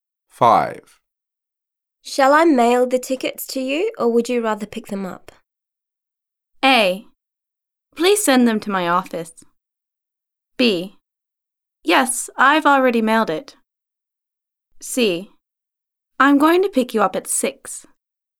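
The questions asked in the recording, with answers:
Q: Shall I mail the tickets to you, or would you rather pick them up?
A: A: Please send them to my office.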